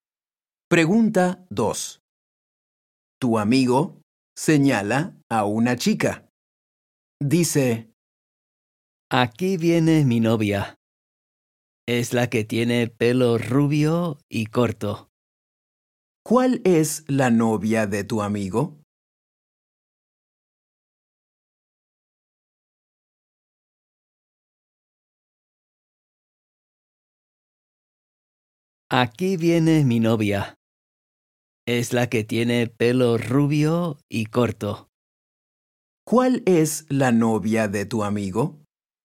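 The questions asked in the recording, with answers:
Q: ¿Cuál es la novia de tu amigo?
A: La que tiene pelo rubio y corto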